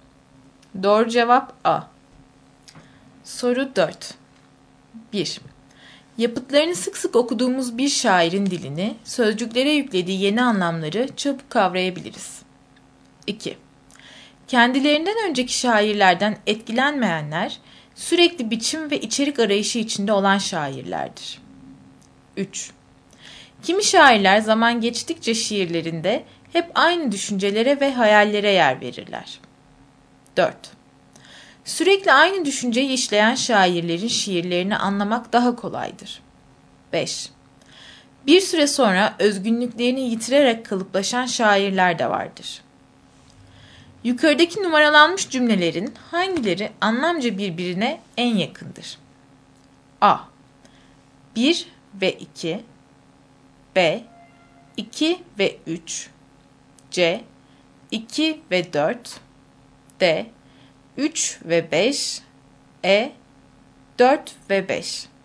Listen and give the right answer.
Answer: Doğru cevap D.